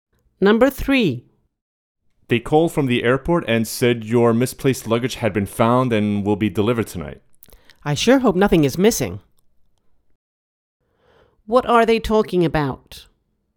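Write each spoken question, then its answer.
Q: What are they talking about?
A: Lost luggage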